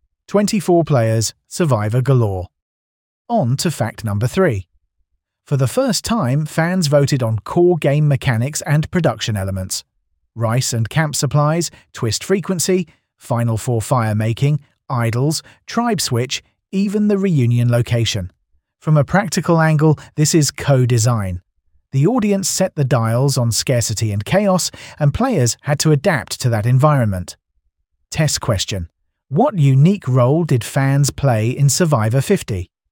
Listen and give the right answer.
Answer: They voted on game mechanics.